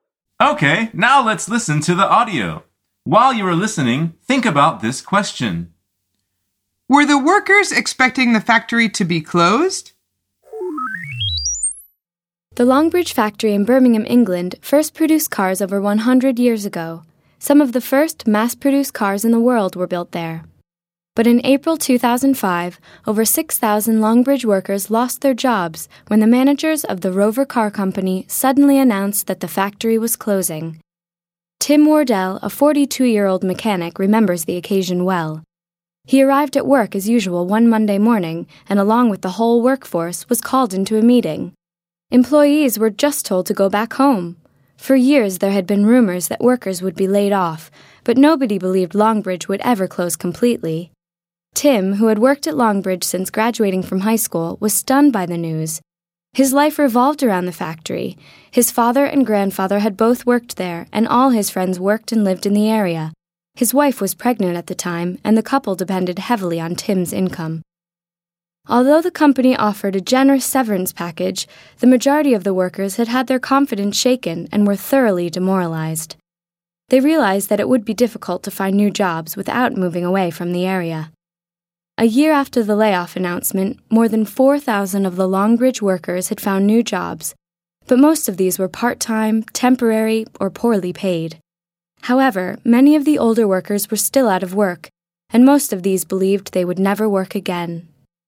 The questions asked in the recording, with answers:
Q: Were the workers expecting the factory to be closed?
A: The answer is no.